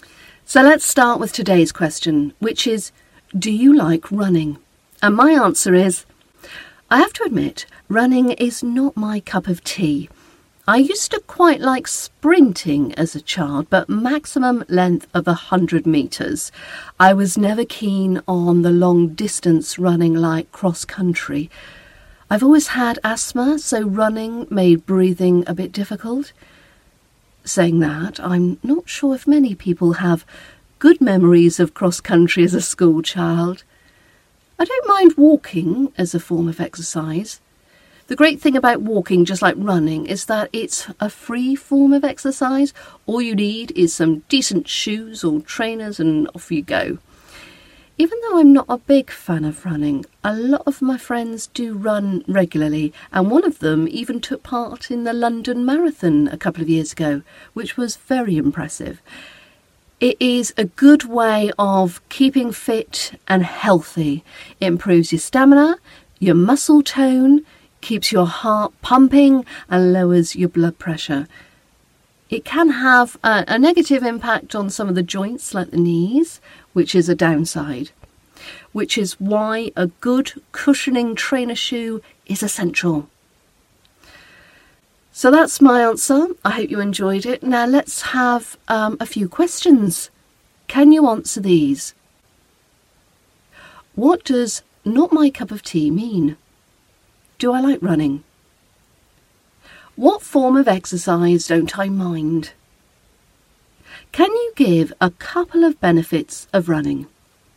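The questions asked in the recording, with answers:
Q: What does not my cup of tea mean?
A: Something you don't like or enjoy

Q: Do I like running?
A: No

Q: What form of exercise don't I mind?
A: Walking

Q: Can you give a couple of benefits of running?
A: It improves stamina and muscle tone, keeps your heart pumping and lowers blood pressure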